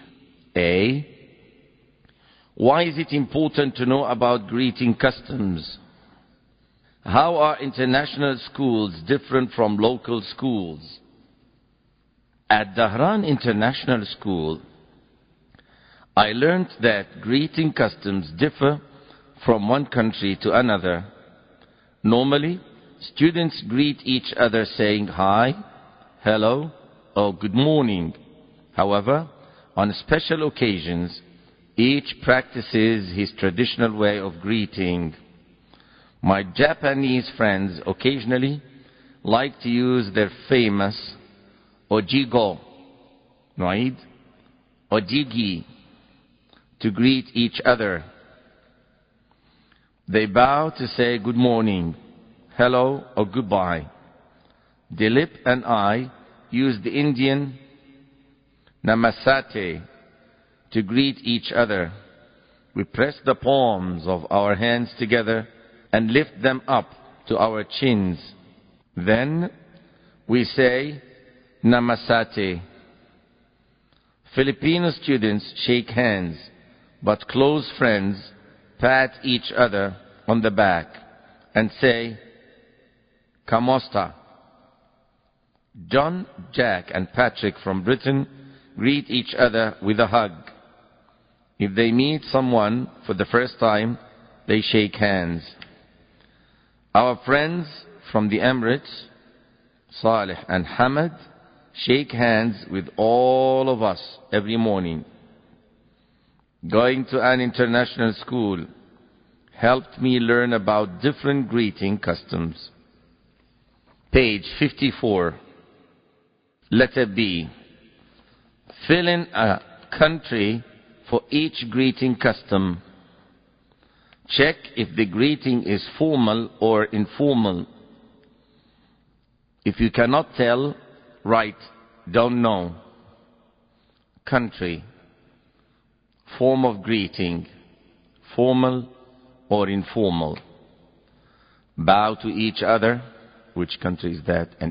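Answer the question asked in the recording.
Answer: Japan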